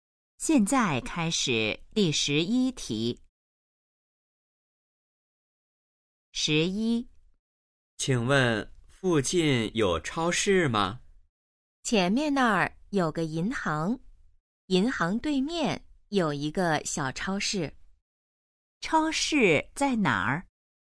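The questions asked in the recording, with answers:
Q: 超市在哪儿?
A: 银行对面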